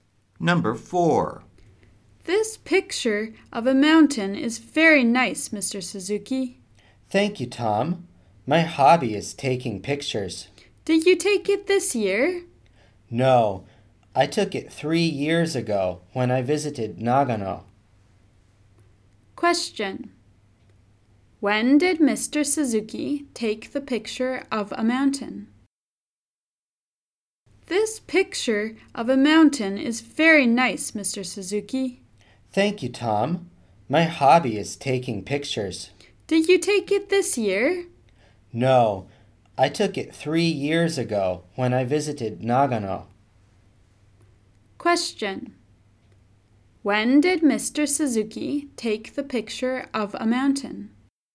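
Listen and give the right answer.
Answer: Three years ago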